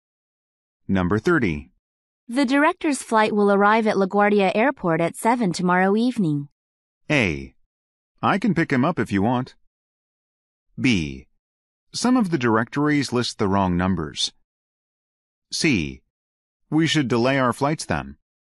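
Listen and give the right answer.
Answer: A: I can pick him up if you want.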